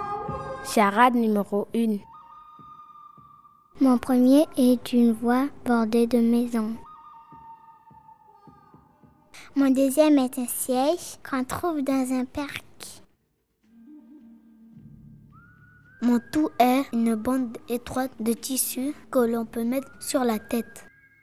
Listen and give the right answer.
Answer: le ruban.